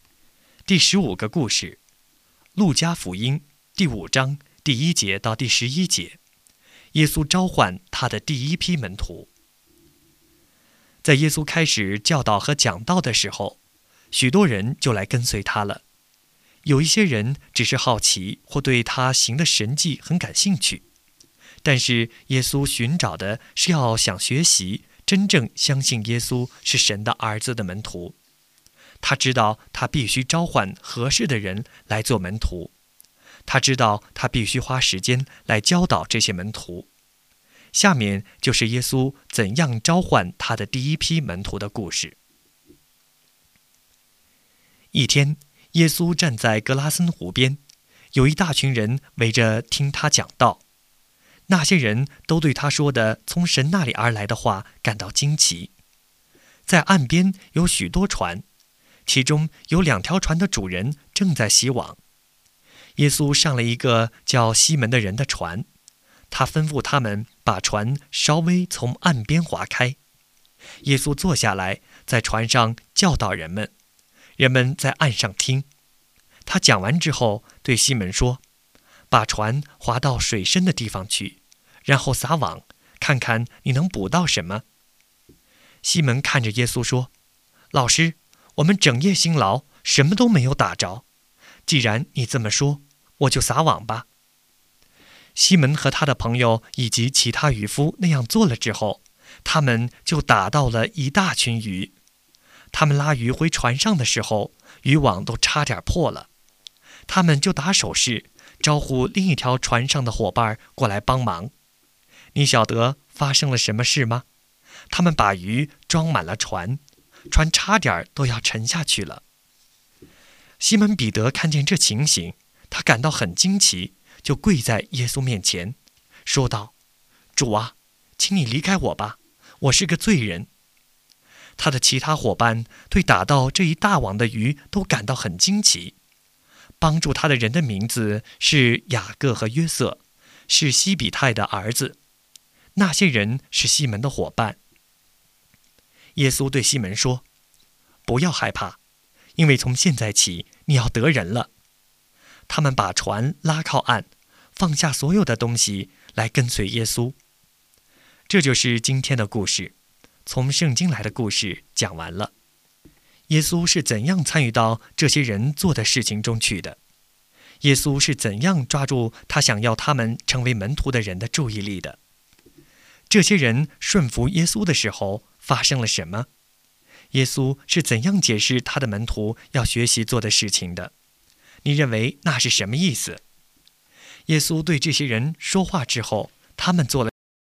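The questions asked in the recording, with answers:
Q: 这些人顺服耶稣的时候发生了什么?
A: 他们打到一大群鱼,网差点破了,两条船都装满了鱼,差点沉下去

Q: 耶稣是怎样解释他的门徒要学习做的事情的?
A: 从现在起你要得人了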